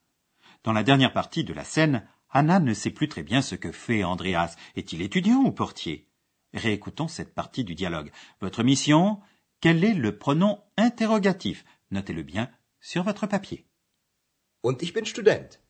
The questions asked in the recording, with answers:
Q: Votre mission Quel est le pronom interrogatif Notez-le bien sur votre papier.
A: Troisième mot cherché, le pronom interrogatif was.